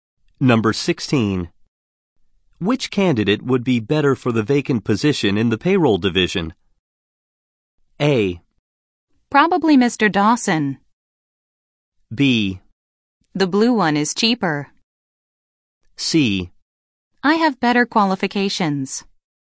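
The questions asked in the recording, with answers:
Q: Which candidate would be better for the vacant position in the payroll division?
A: A: Probably Mr. Dawson.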